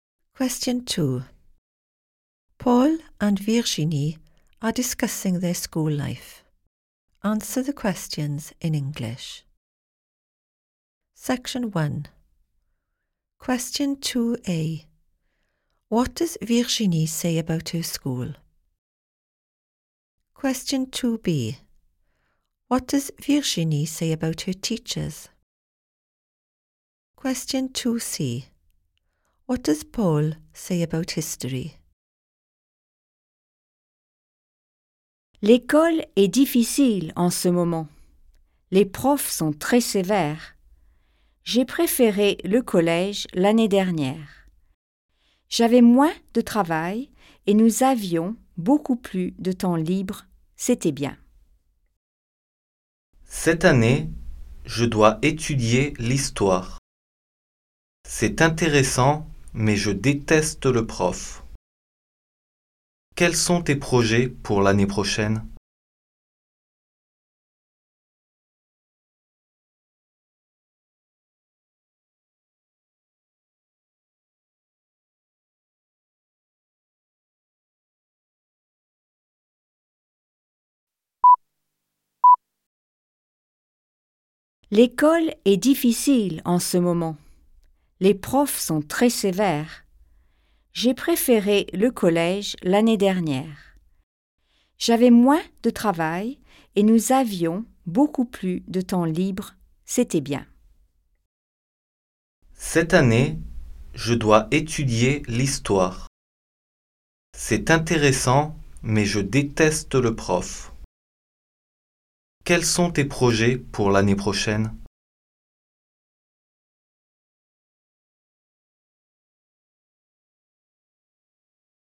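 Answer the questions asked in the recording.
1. It is difficult at the moment
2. They are very strict
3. It is interesting but he hates the teacher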